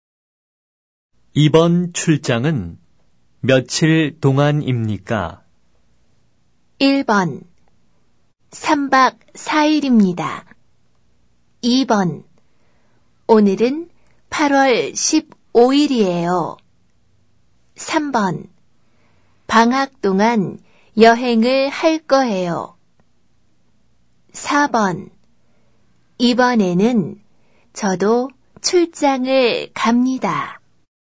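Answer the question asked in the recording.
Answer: 1: 3박 4일입니다.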